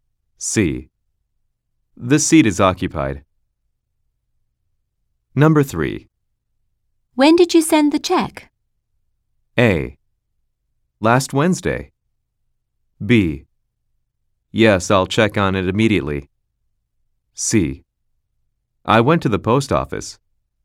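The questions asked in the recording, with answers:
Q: When did you send the check?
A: A: Last Wednesday.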